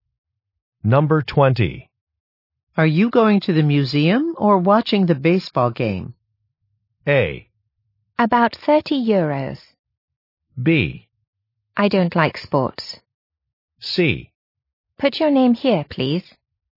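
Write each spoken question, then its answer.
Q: Are you going to the museum or watching the baseball game?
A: B: I don't like sports.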